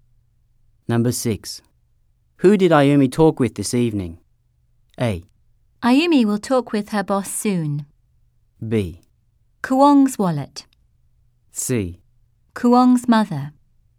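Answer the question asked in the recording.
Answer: C: Kuong's mother.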